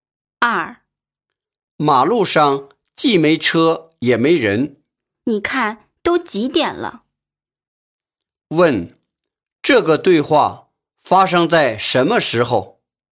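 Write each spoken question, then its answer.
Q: 这个对话发生在什么时候?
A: 深夜,很晚的时候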